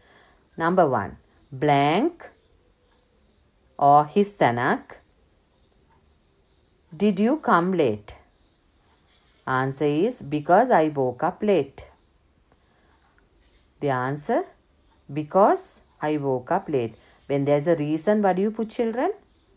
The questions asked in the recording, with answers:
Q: Number one, blank or histanak.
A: Why did you come late?